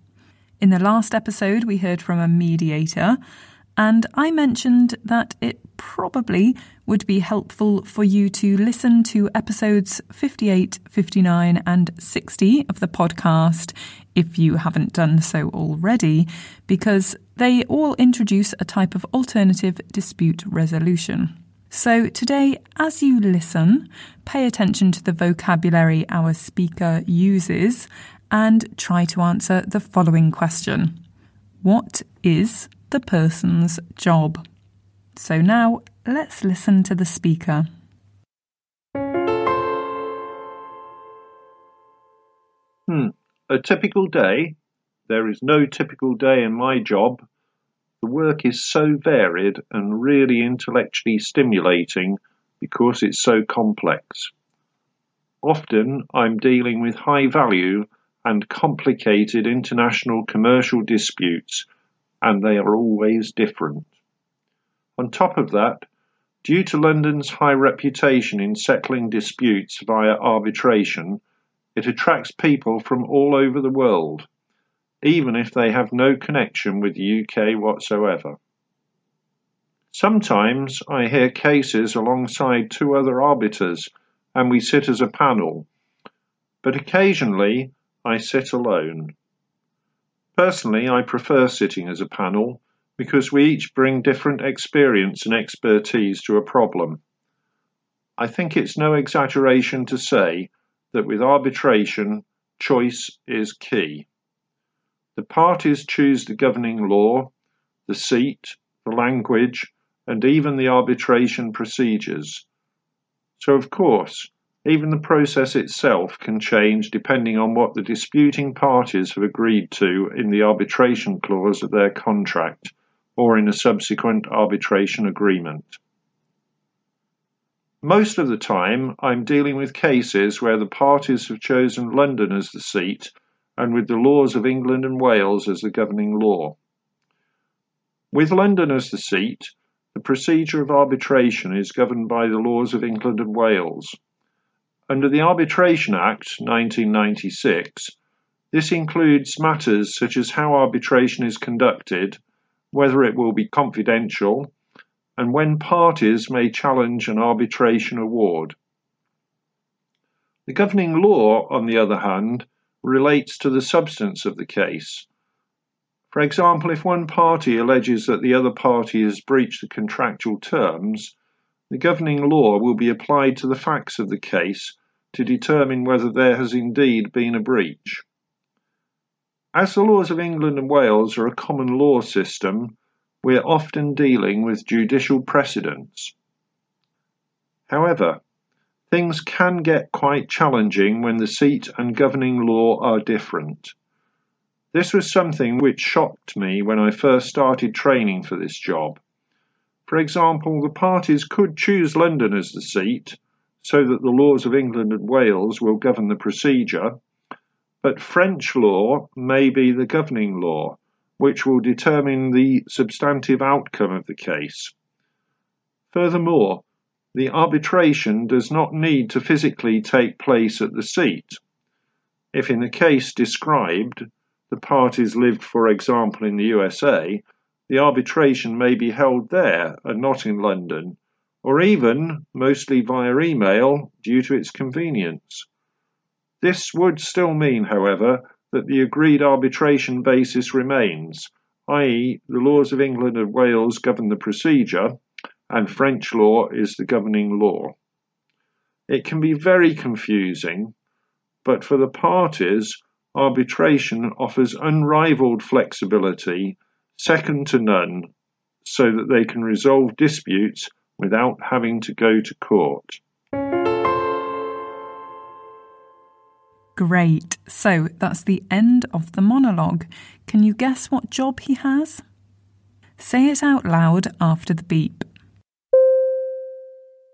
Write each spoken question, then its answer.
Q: What is the person's job?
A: Of course, he's an arbitrator.